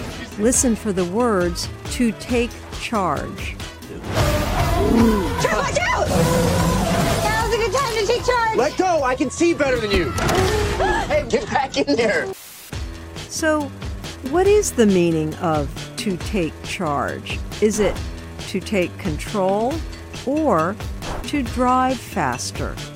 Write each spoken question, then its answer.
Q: So, what is the meaning of to take charge? Is it to take control or to drive faster?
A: To take charge means to take control.